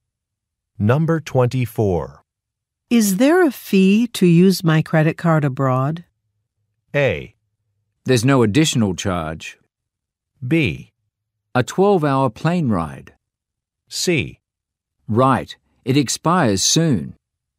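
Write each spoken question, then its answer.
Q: Is there a fee to use my credit card abroad?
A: A: There's no additional charge.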